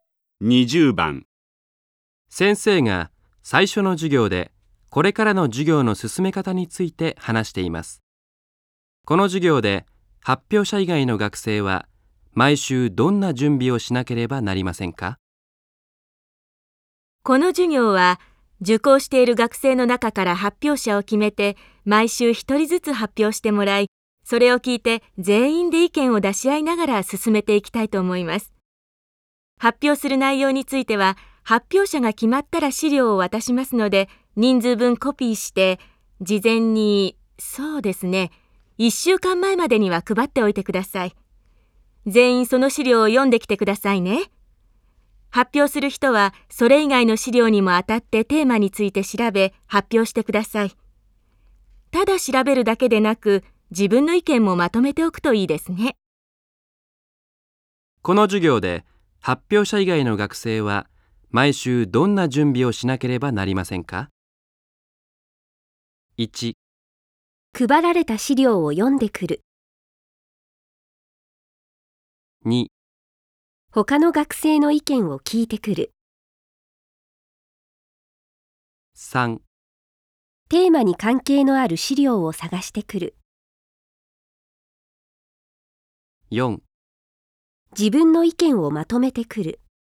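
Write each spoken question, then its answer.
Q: この授業で、発表者以外の学生は毎週どんな準備をしなければなりませんか?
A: 1: 配られた資料を読んでくる。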